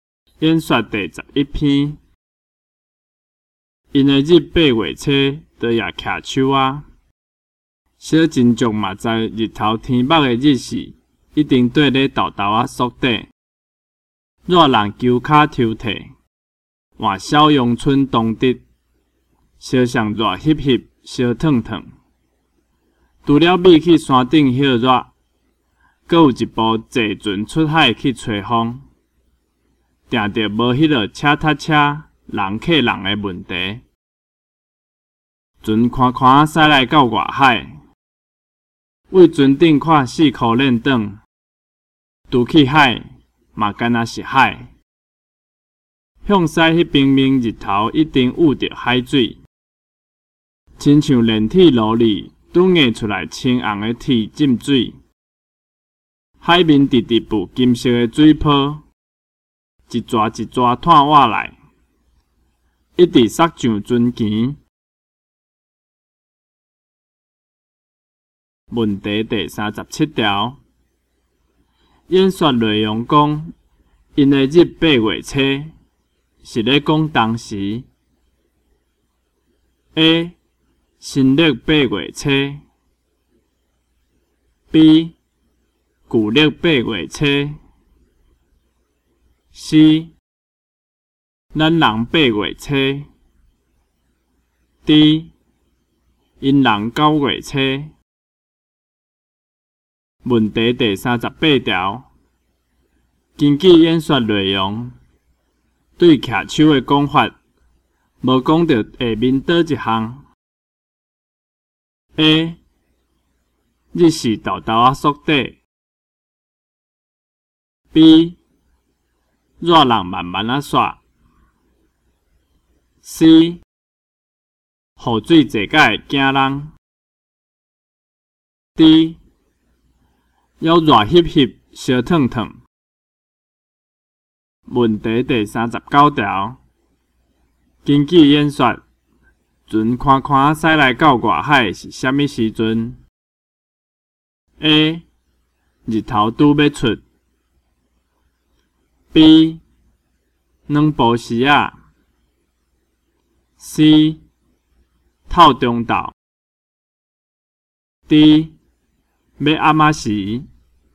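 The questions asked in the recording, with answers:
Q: 根据演说内容,对骑手的讲法,无讲到下面倒一项 :A 日时豆豆啊缩短 ,B。 热人慢慢啊刷 ,C, 雨水坐甲会惊人 ,D, 要热翕翕烧烫烫。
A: C: 雨水坐甲会惊人

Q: 根据演说,船宽宽驶来到外海是虾米时阵 ?A, 日头拄要出 ,B。 两步时啊 ,C, 透中昼 ,D, 要暗时。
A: D: 要暗时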